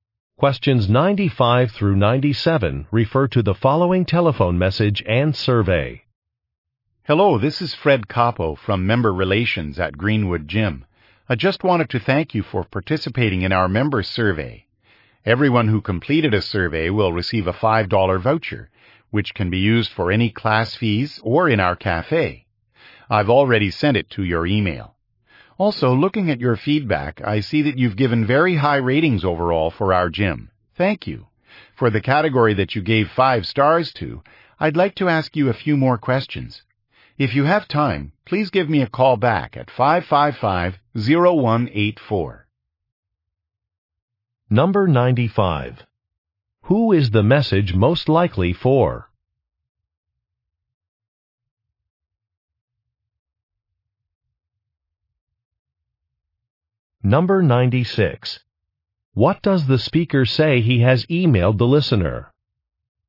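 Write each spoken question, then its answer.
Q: Who is the message most likely for?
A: A gym member

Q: What does the speaker say he has emailed the listener?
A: A $5 voucher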